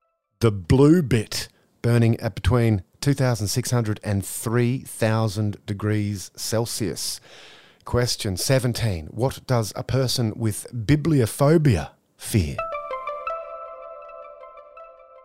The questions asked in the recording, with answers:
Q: What does a person with bibliophobia fear?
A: Books.